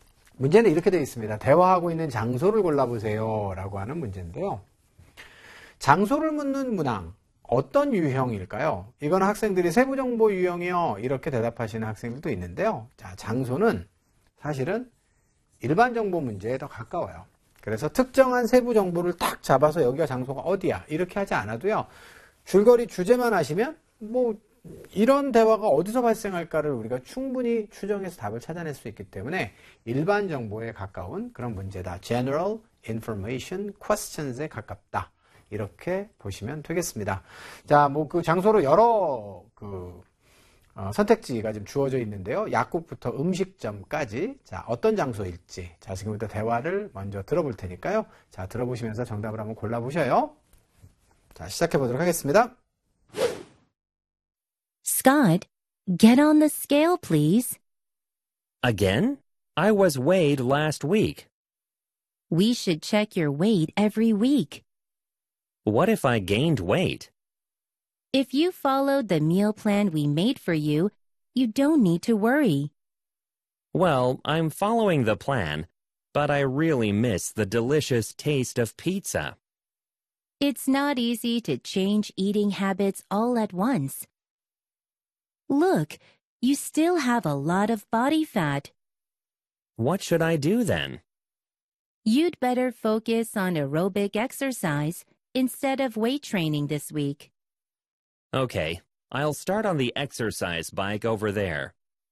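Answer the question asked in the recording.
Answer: 헬스장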